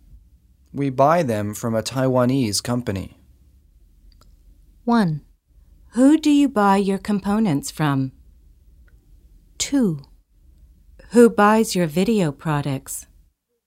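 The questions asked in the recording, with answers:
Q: We buy them from a Taiwanese company.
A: 1: Who do you buy your components from?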